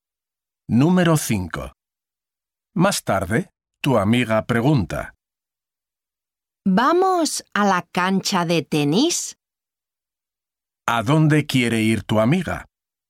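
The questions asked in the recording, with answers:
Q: ¿A dónde quiere ir tu amiga?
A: A la cancha de tenis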